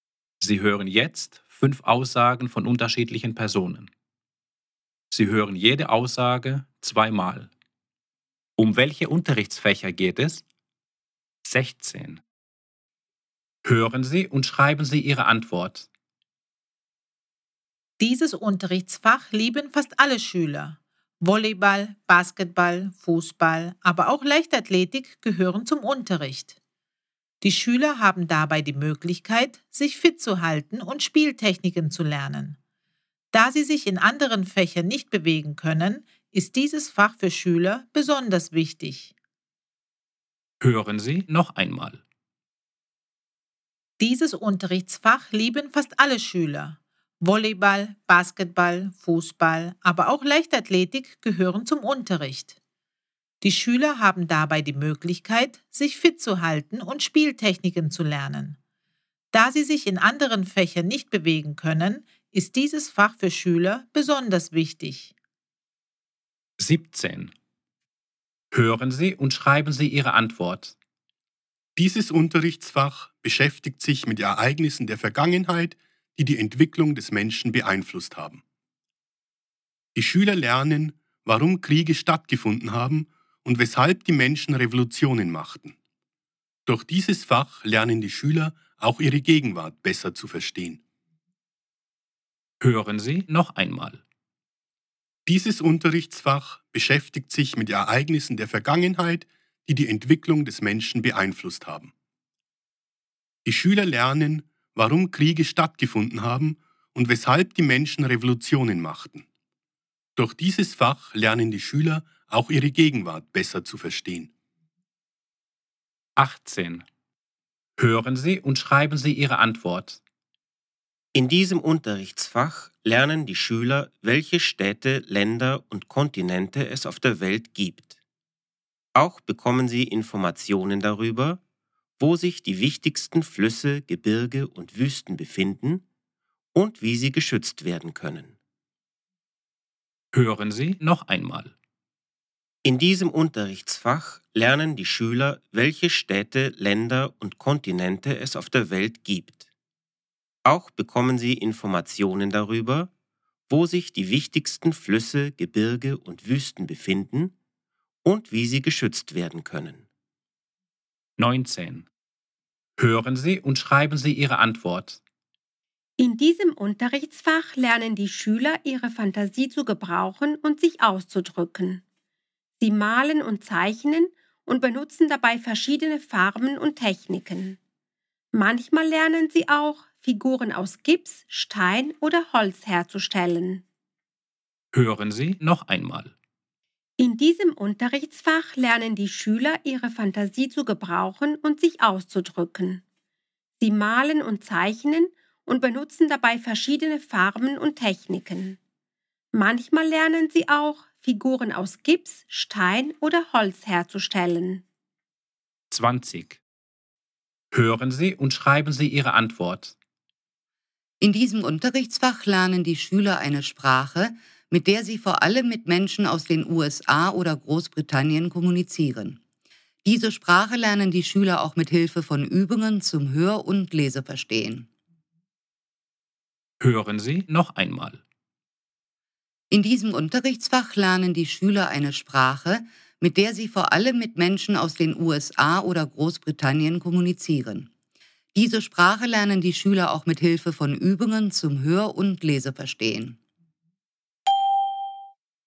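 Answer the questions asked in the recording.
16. Sport
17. Geschichte
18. Erdkunde
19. Kunst
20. Englisch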